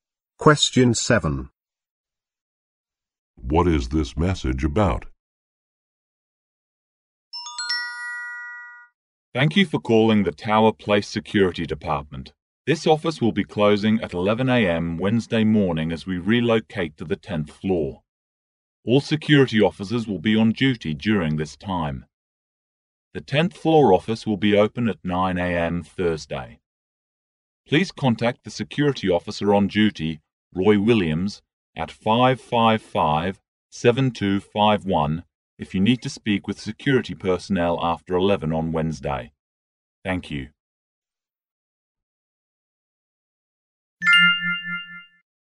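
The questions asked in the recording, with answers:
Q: What is this message about?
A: The security office relocating to the 10th floor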